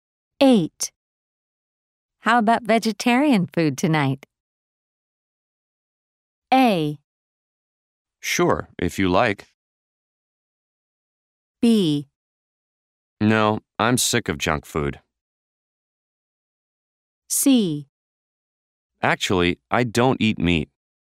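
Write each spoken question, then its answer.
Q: How about vegetarian food tonight?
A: A: Sure, if you like.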